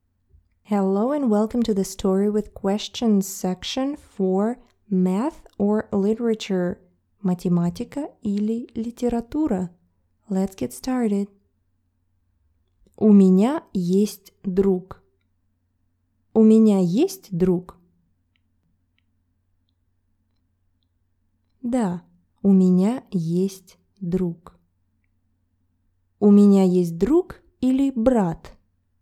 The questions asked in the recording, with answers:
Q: У меня есть друг или брат?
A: Друг. У меня есть друг.